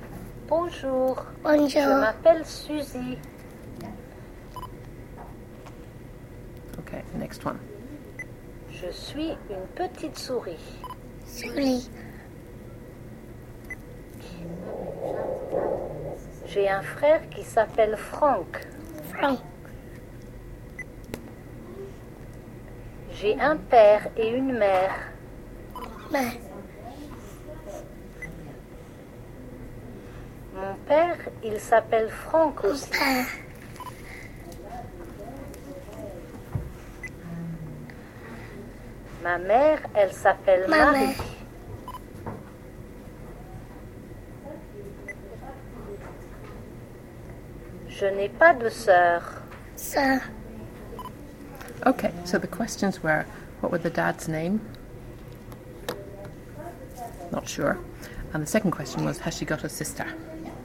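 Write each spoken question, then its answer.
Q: what were the dad's name?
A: Franck

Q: has she got a sister?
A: No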